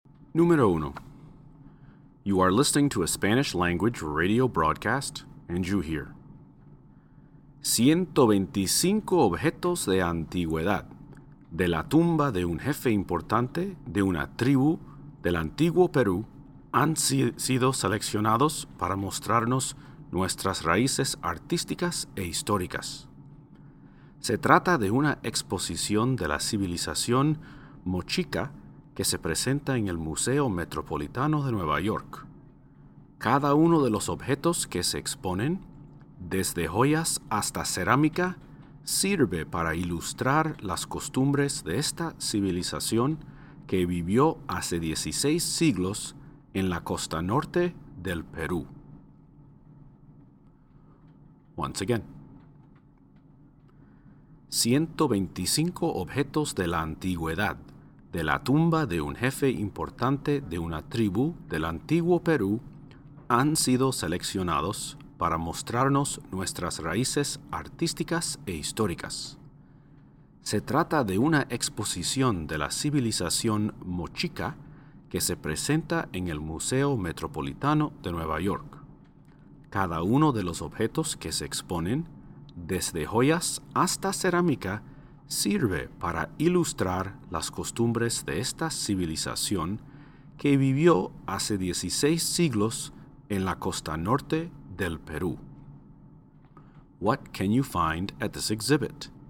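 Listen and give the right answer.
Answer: Ancient objects (jewelry and ceramics) from the tomb of a Mochica chief of ancient Peru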